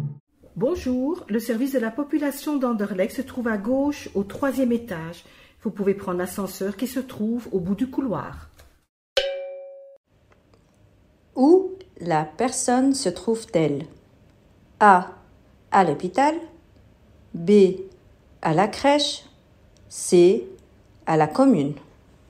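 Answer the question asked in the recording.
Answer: C: À la commune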